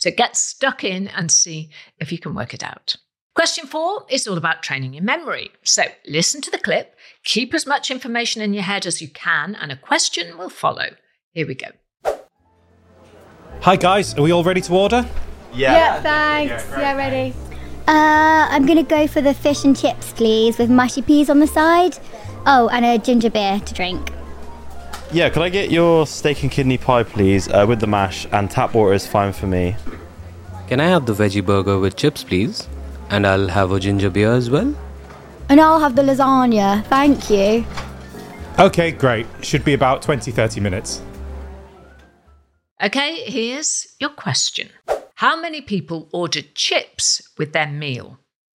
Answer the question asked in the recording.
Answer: And the answer was 2. 2 portions of chips.